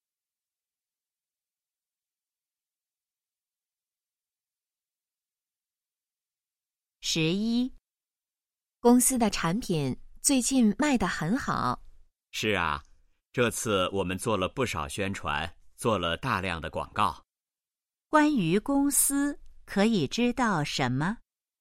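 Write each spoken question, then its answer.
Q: 关于公司,可以知道什么?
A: 做了大量的广告,产品卖得很好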